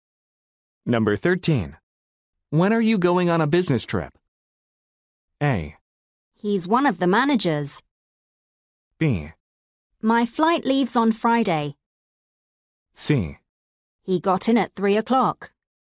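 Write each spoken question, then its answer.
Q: When are you going on a business trip?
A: B: My flight leaves on Friday.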